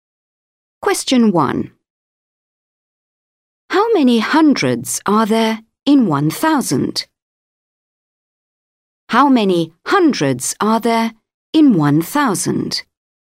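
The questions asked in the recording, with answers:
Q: How many hundreds are there in 1,000?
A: 10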